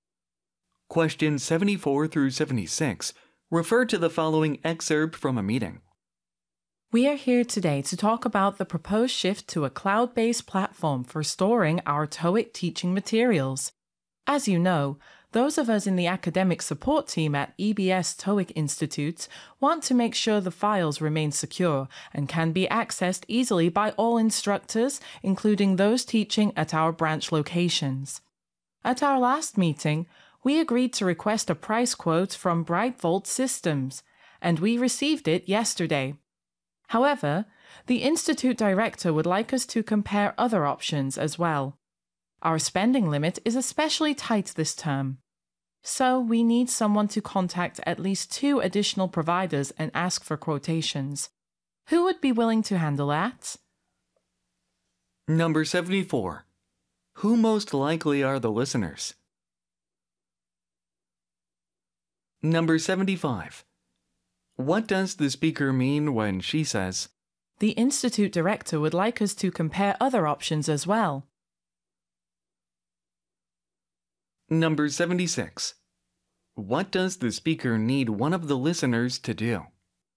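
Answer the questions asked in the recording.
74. Members of the academic support team at a TOEIC institute
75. They need more price quotes from other providers
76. Contact at least two more providers for price quotes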